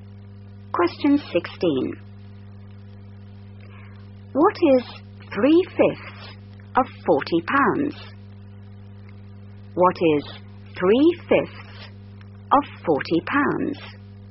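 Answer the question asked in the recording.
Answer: £24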